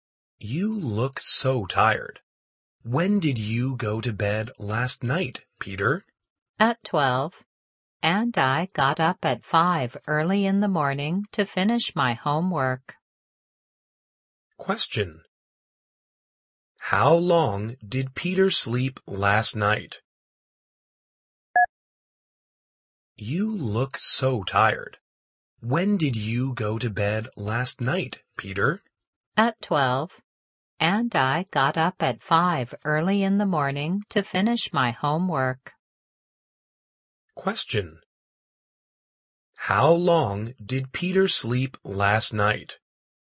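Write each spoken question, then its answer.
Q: How long did Peter sleep last night?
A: Five hours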